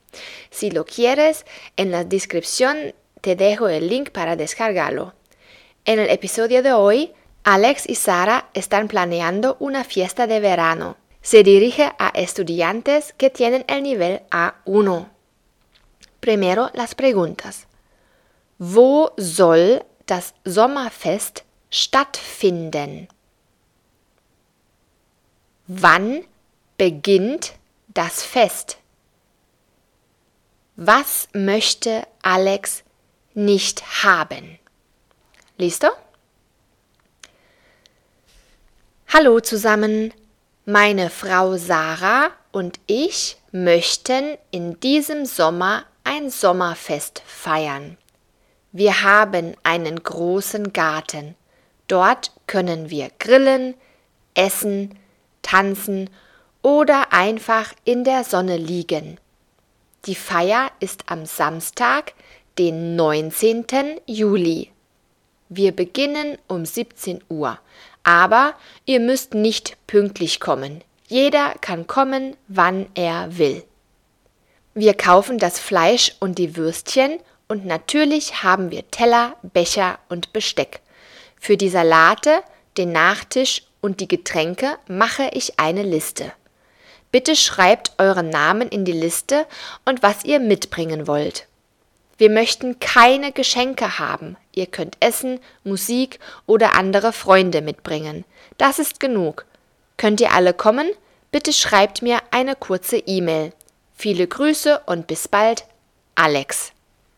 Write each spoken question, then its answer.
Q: Wo soll das Sommerfest stattfinden?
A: Im Garten.

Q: Wann beginnt das Fest?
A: Um 17 Uhr.

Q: Was möchte Alex nicht haben?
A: Geschenke.